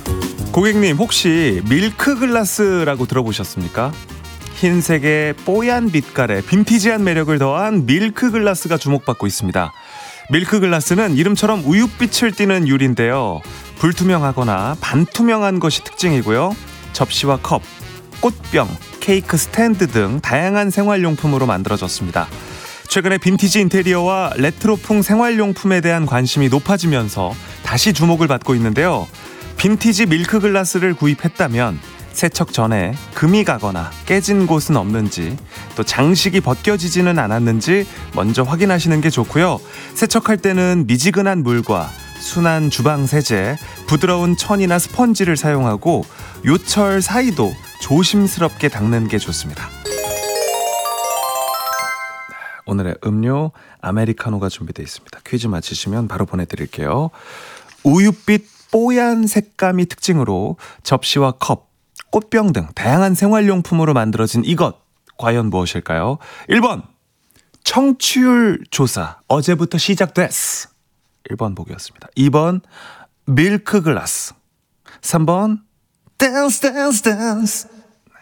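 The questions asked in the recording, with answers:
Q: 우윳빛 뽀얀 색감이 특징으로 접시와 컵, 꽃병 등 다양한 생활용품으로 만들어진 이것, 과연 무엇일까요?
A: 2: 밀크글라스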